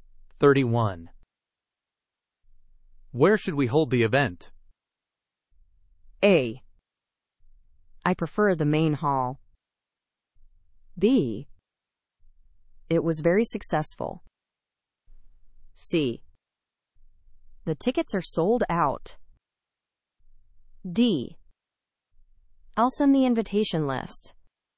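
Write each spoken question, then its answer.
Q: Where should we hold the event?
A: A: I prefer the main hall.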